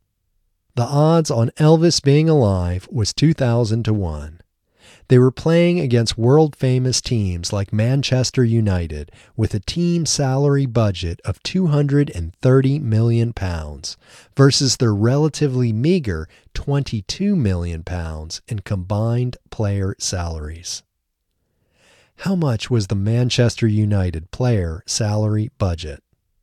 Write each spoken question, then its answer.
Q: How much was the Manchester United player salary budget?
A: The Manchester United player salary budget was £230 million.